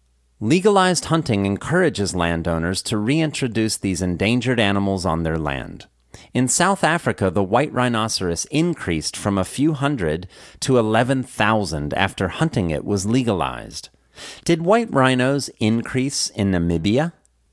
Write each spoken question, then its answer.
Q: Did white rhinos increase in Namibia?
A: No, white rhinos didn't increase in Namibia.